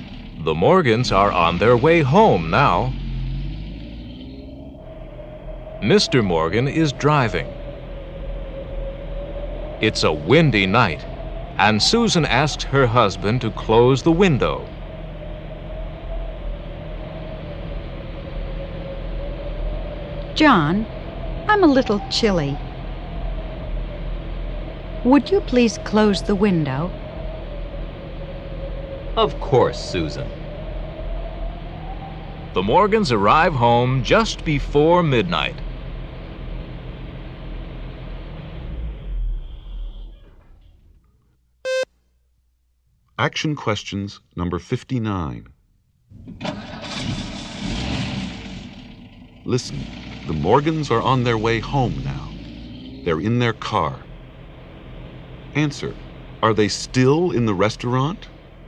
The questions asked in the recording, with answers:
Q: Answer, are they still in the restaurant?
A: No, they're not.